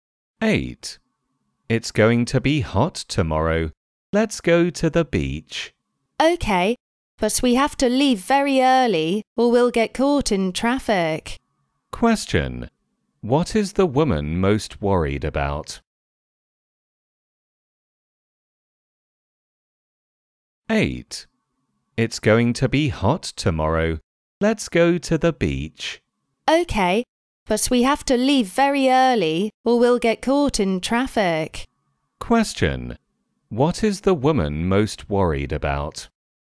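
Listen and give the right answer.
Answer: Getting caught in traffic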